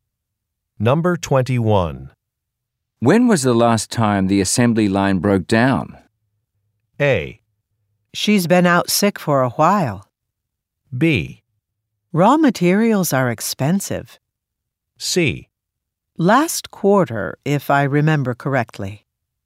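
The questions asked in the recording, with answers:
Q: When was the last time the assembly line broke down?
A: C: Last quarter, if I remember correctly.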